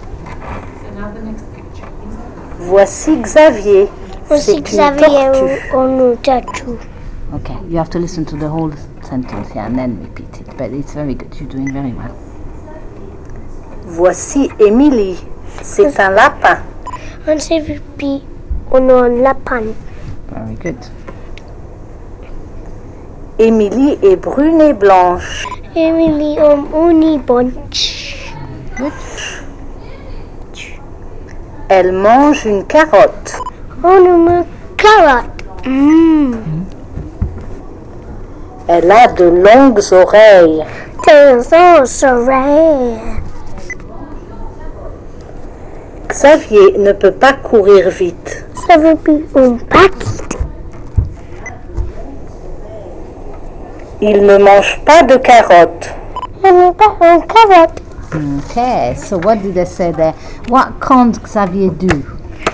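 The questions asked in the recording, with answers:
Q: What can't Xavier do?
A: Run fast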